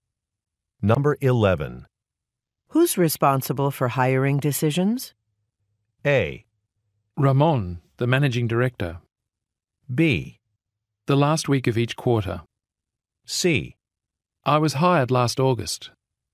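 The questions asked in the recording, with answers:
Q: Who's responsible for hiring decisions?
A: A: Ramon, the managing director.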